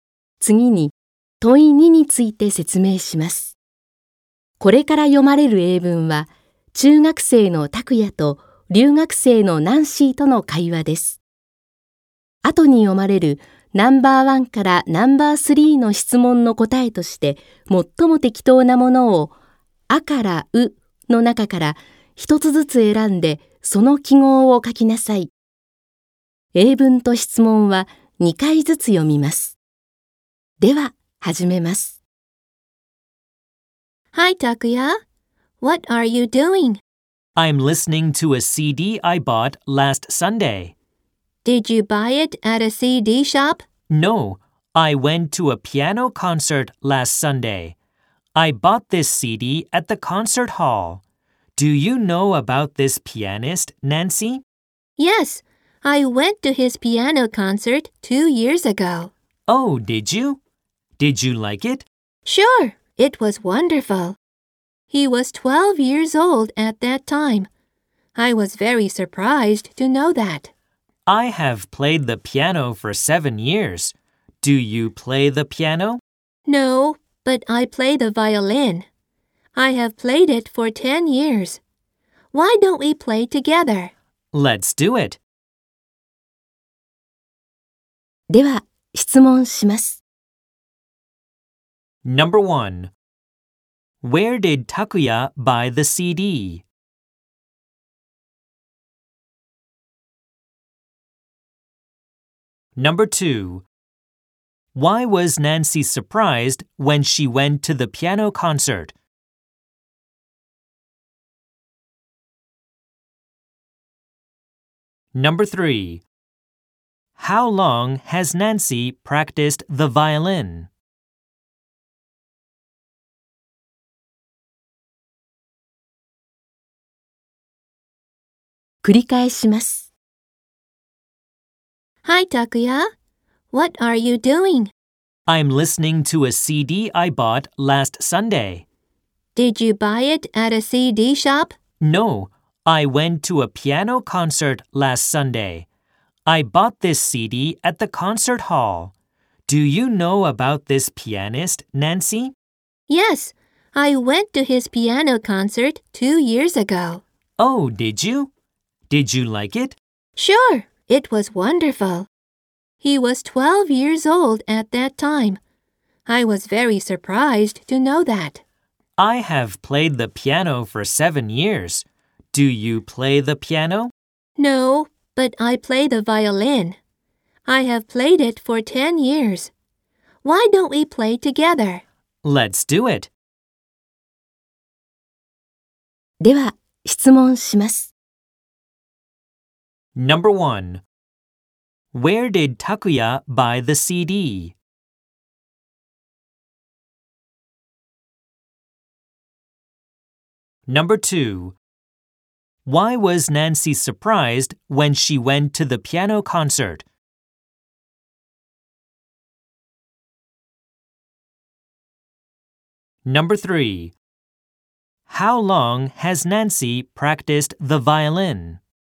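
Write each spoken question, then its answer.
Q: Where did Takuya buy the CD?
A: At the concert hall

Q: Why was Nancy surprised when she went to the piano concert?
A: Because the pianist was 12 years old

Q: How long has Nancy practiced the violin?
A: For 10 years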